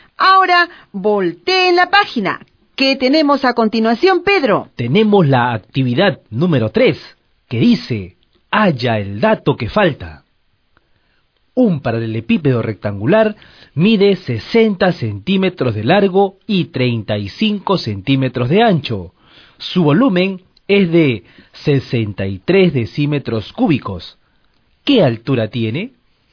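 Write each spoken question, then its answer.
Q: ¿Qué altura tiene?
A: 30 centímetros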